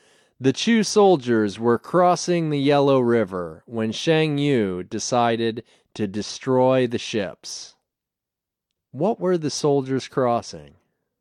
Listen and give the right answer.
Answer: They were crossing the Yellow River.